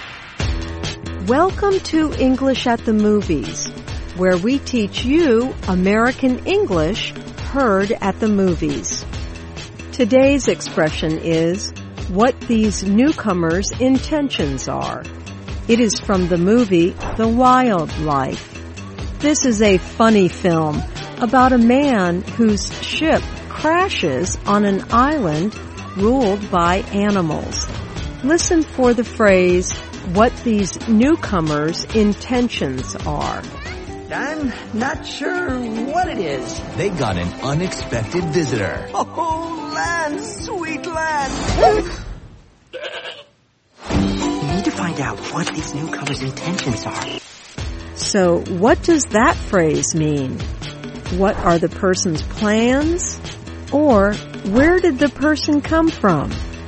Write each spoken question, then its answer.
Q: So, what does that phrase mean?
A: What these newcomers' intentions are means what are the person's plans?